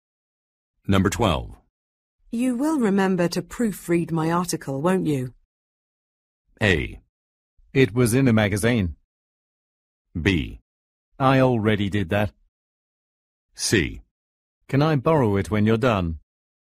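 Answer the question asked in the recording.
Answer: B: I already did that.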